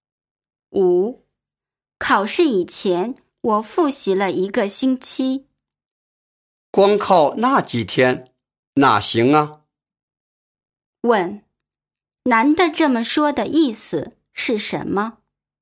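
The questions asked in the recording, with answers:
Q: 男的这么说的意思是什么?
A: 只复习一个星期不够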